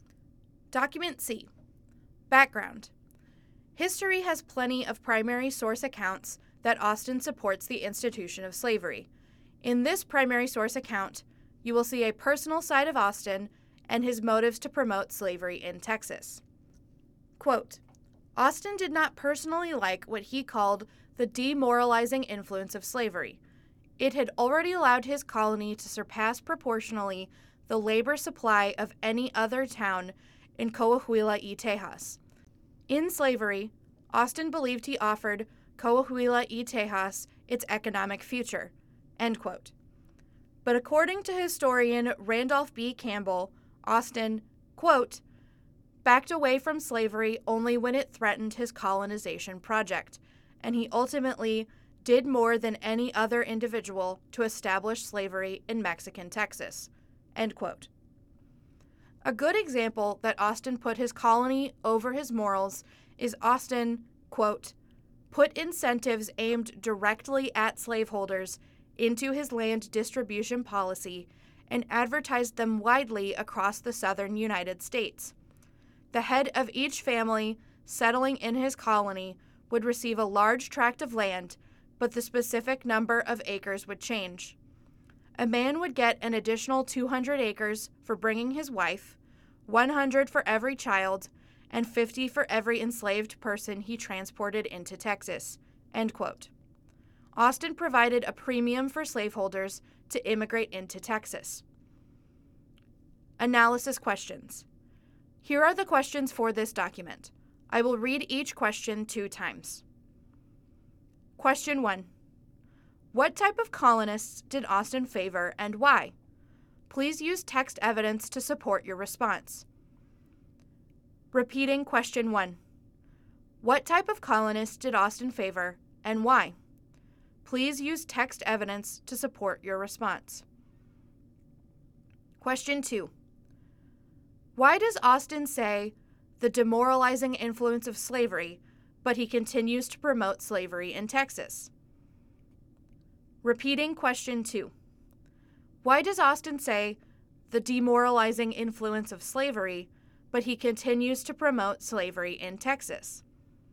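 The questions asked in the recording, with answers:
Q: What type of colonists did Austin favor and why?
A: Slaveholders, because he believed slave labor would bring economic success to his colony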